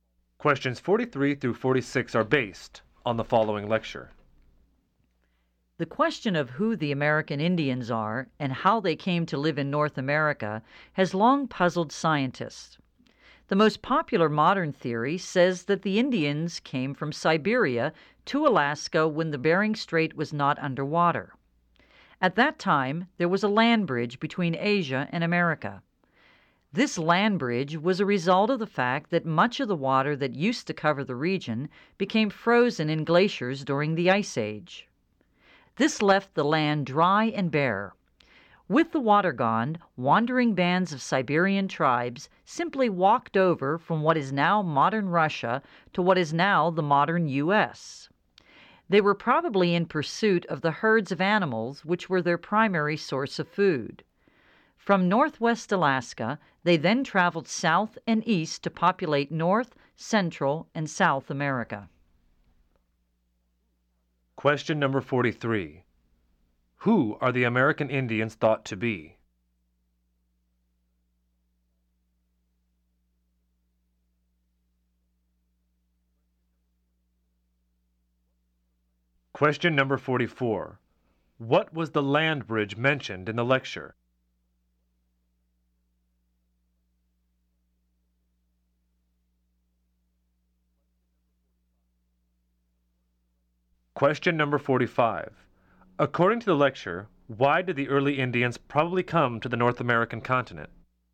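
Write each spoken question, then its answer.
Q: Who are the American Indians thought to be?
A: Descendants of Siberian tribes who came from Asia

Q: What was the land bridge mentioned in the lecture?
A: Dry land between Asia and America across the Bering Strait, exposed when water froze in glaciers during the Ice Age

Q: According to the lecture, why did the early Indians probably come to the North American continent?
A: They were following the herds of animals they hunted for food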